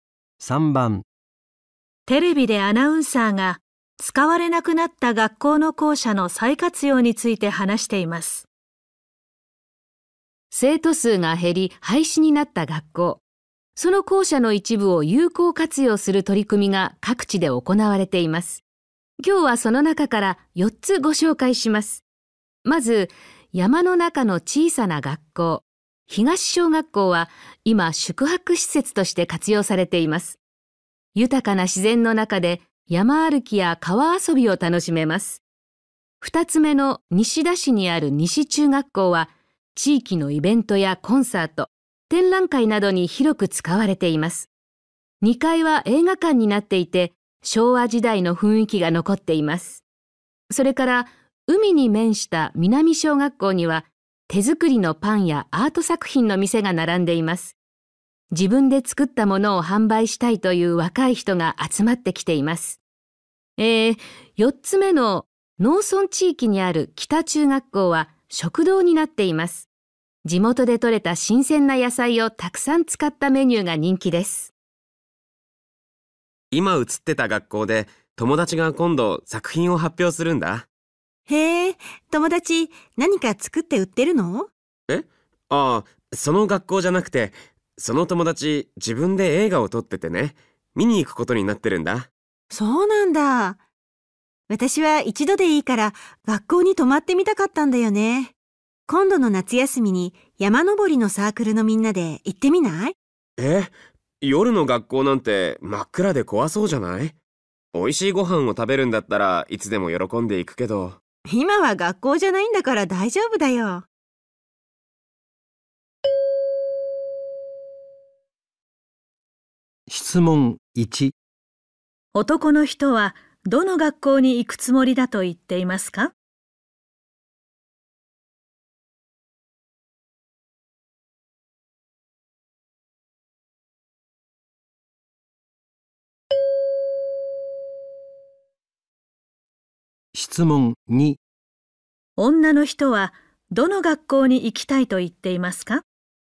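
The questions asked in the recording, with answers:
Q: 男の人はどの学校に行くつもりだと言っていますか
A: 西中学校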